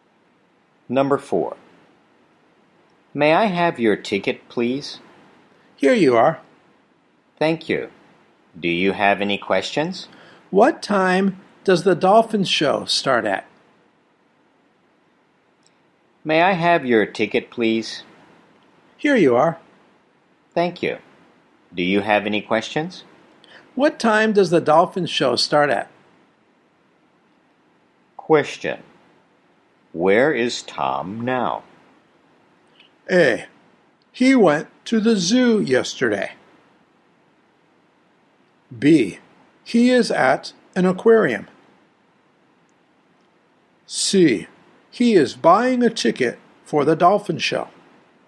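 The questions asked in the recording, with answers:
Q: Where is Tom now?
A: B: He is at an aquarium.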